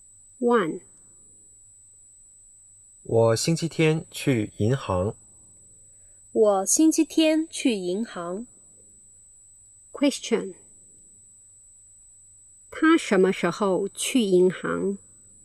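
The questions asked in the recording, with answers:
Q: 他什么时候去银行?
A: 星期天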